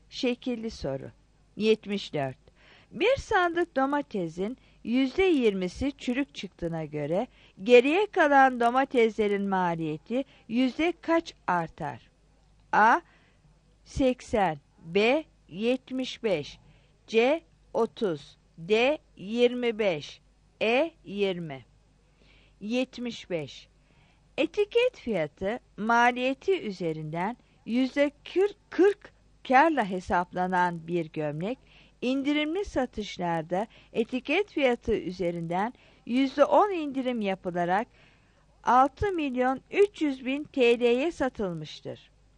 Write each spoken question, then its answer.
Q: Bir sandık domatesin %20'si çürük çıktığına göre geriye kalan domateslerin maliyeti yüzde kaç artar?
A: 74 D